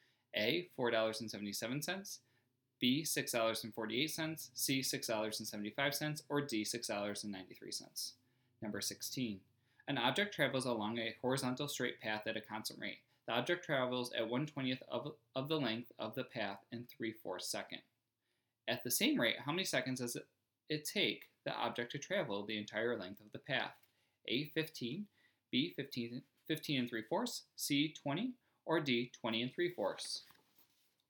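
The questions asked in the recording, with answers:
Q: At the same rate, how many seconds does it take the object to travel the entire length of the path?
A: A: 15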